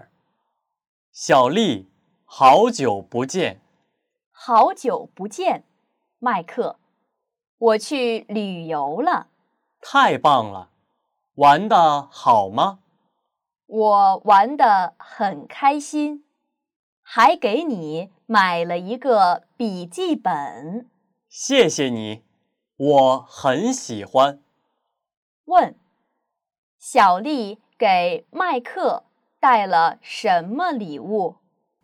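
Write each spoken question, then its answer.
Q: 问,小丽给麦克带了什么礼物?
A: 一个笔记本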